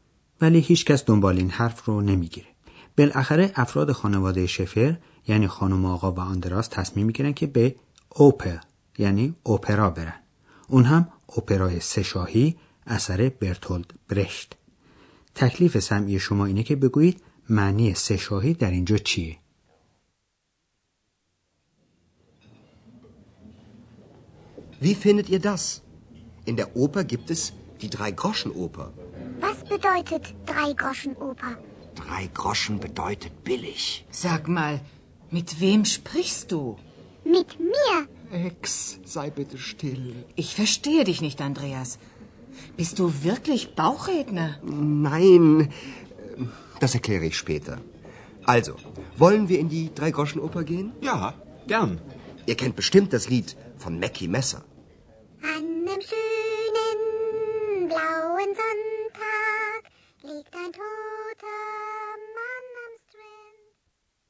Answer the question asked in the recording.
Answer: بله، منظور از اون چیز ارزان و کمبهاست.